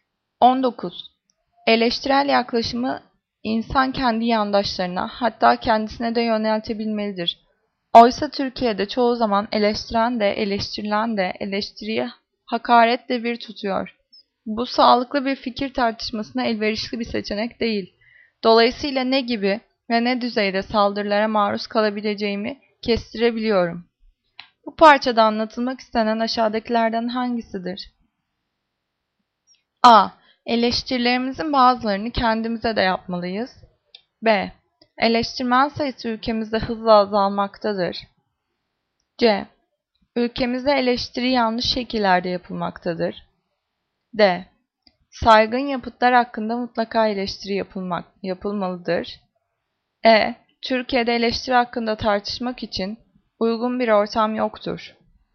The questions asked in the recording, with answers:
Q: Bu parçada anlatılmak istenen aşağıdakilerden hangisidir?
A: Cevap C. Ülkemizde eleştiri yanlış şekillerde yapılmaktadır.